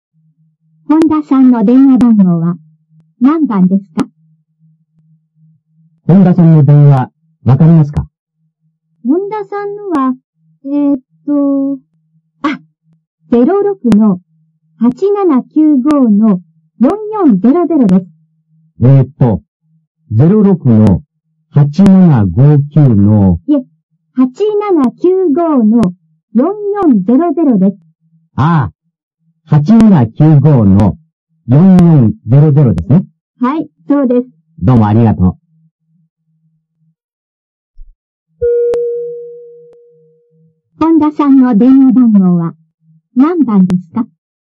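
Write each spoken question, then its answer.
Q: 本田さんの電話番号は何番ですか?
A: 8795-4400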